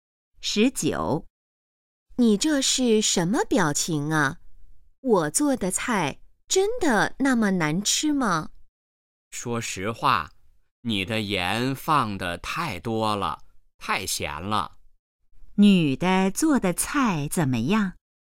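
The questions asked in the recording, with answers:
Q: 女的做的菜怎么样?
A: 太咸了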